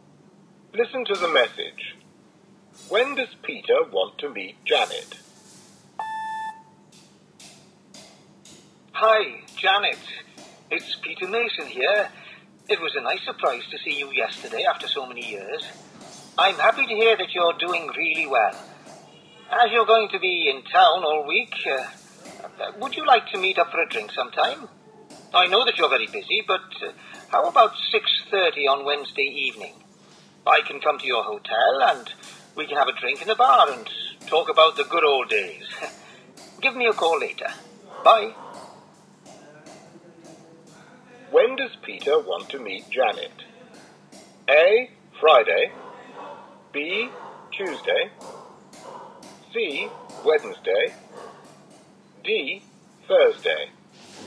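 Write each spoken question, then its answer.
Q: When does Peter want to meet Janet?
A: C: Wednesday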